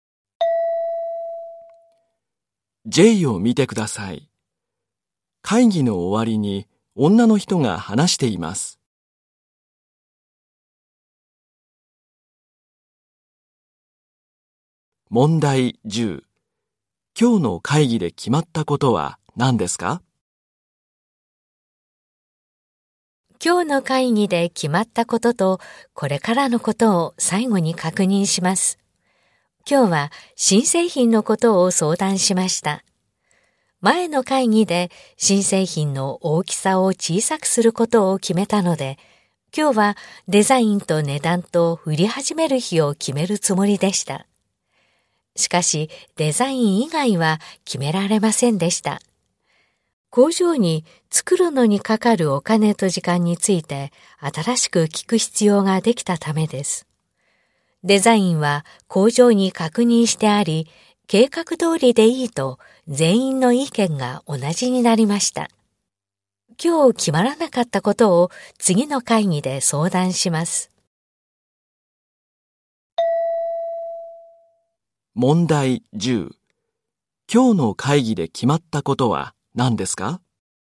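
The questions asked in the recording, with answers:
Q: 今日の会議で決まったことは何ですか?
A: デザイン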